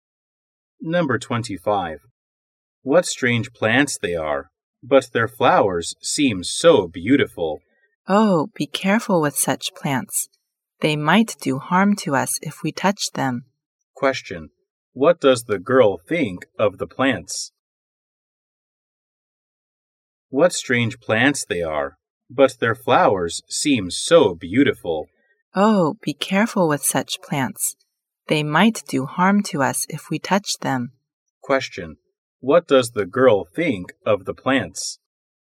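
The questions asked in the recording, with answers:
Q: What does the girl think of the plants?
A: They might be harmful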